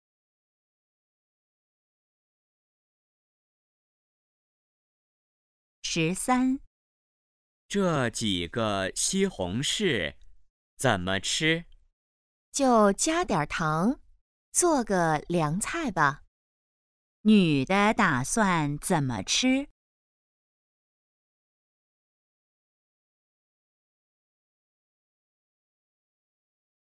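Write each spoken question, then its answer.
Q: 女的打算怎么吃?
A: 加点糖做凉菜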